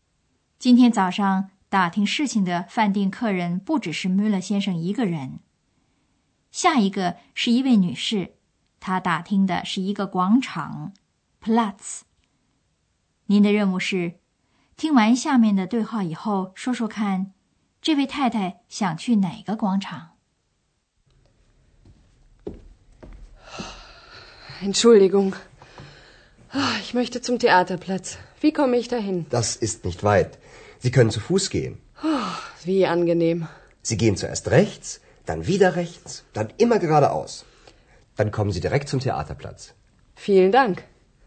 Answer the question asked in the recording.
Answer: 这位太太要找的是剧场广场。